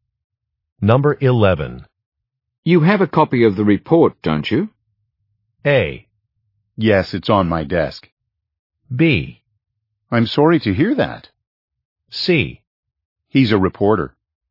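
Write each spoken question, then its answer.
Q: You have a copy of the report, don't you?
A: A: Yes, it's on my desk.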